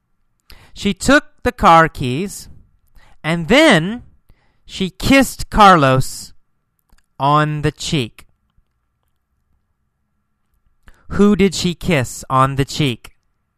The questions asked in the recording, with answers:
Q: Who did she kiss on the cheek?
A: Carlos. She kissed Carlos on the cheek.